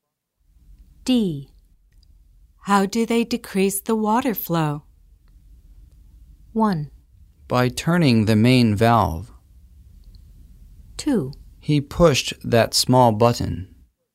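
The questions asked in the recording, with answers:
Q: How do they decrease the water flow?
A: 1: By turning the main valve.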